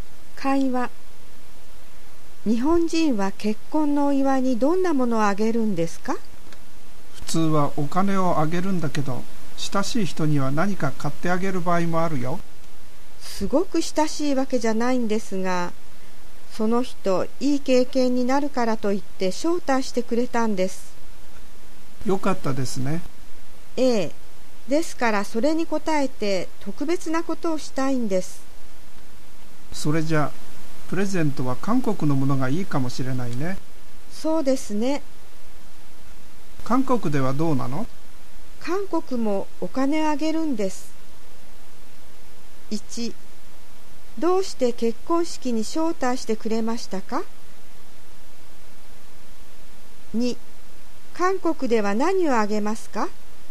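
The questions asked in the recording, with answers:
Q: どうして結婚式に招待してくれましたか?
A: いい経験になるから

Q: 韓国では何をあげますか?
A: お金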